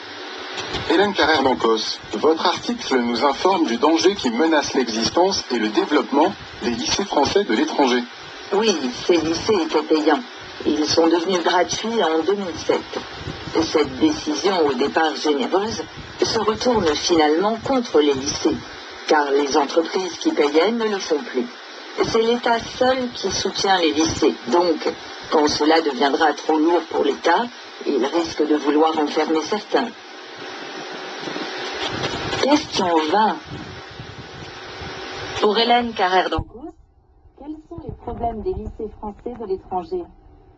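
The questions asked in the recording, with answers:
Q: Pour Hélène Carrère-Dancourt, quels sont les problèmes des lycées français de l'étranger ?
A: Devenus gratuits en 2007, ils ne sont plus financés par les entreprises ; seul l'État les soutient et il risque d'en fermer certains.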